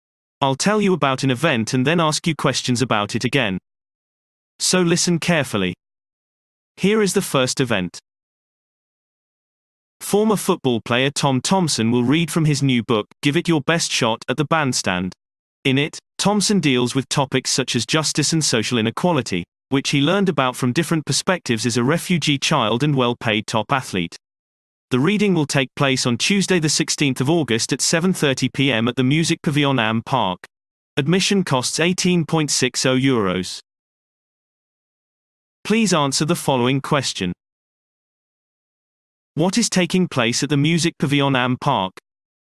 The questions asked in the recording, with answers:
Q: What is taking place at the Music Pavilion Am Park?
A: Former football player Tom Thompson will read from his new book, Give It Your Best Shot, at the bandstand, addressing issues of justice and social inequality.